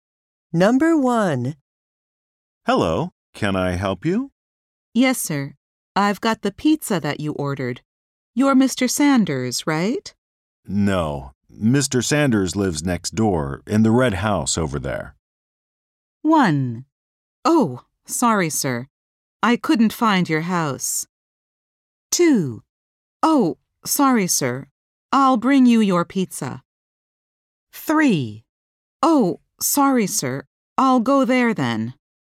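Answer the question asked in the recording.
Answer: 3: Oh, sorry, sir. I'll go there then.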